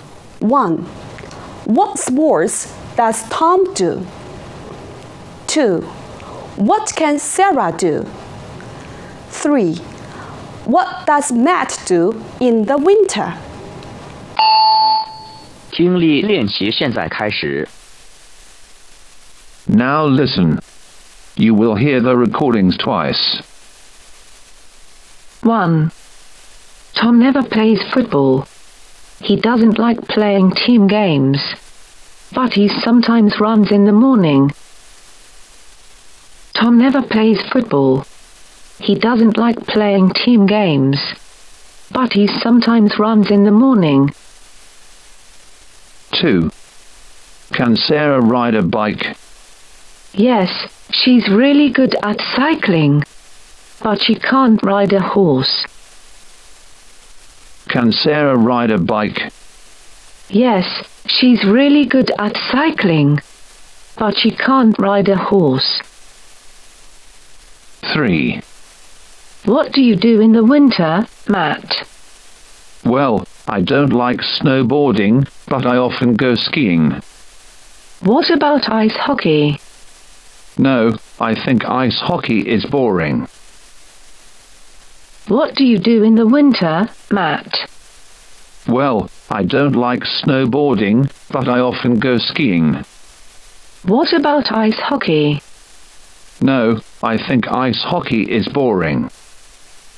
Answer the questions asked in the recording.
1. 第一题,选择 C, 关键信息是 ran。
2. 第二题,选择 A, 关键信息是 ride a bike。
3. 第三题,选择 B, 关键信息是 go skiing。